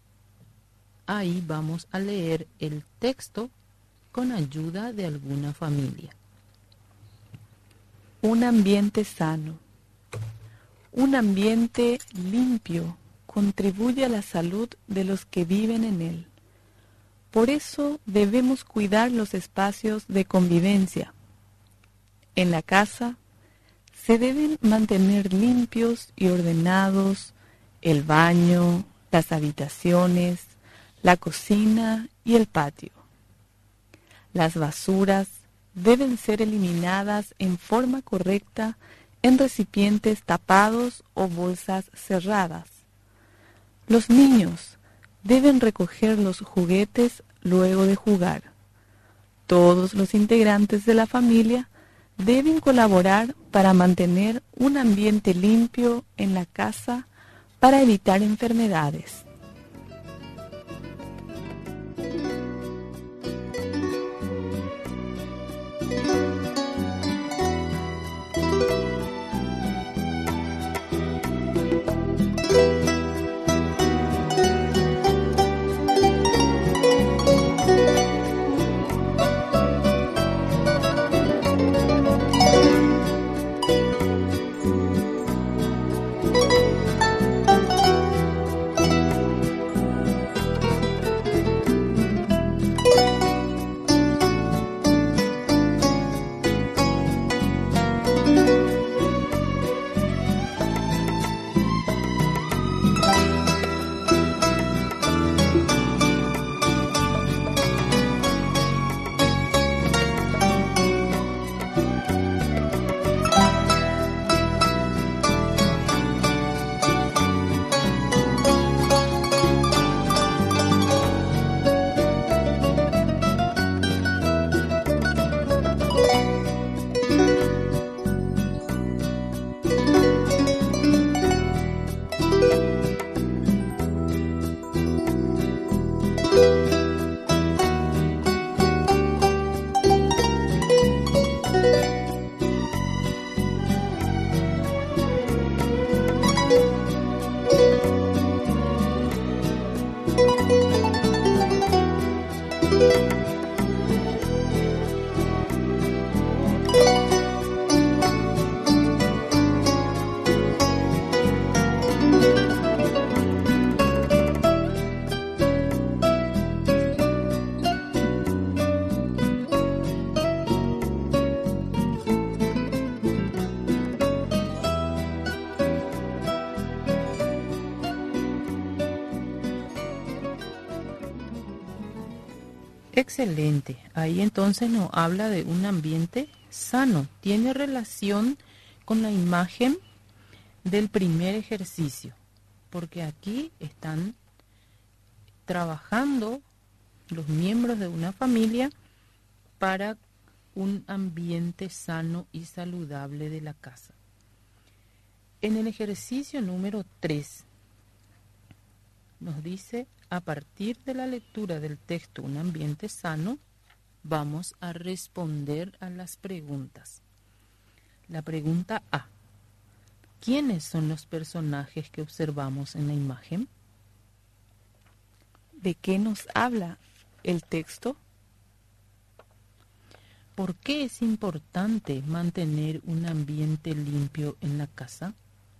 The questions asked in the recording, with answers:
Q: ¿De qué nos habla el texto?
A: Ahí entonces nos habla de un ambiente sano.